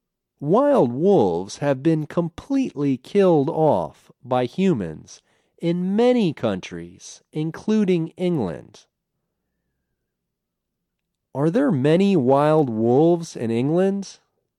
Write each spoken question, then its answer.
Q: Are there many wild wolves in England?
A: No, they've been killed off.